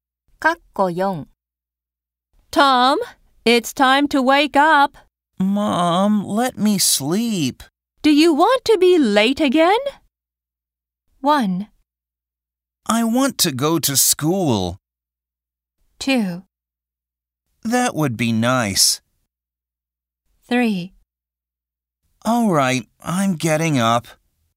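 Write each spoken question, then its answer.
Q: Do you want to be late again?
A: 3: All right, I'm getting up.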